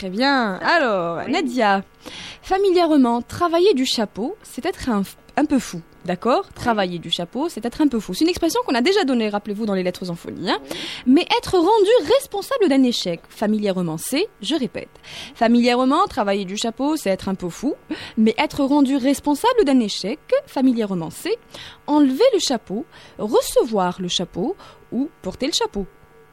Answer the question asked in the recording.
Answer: Effectivement, quand on est responsable ou quand on est rendu responsable d'un échec, on dit on porte le chapeau.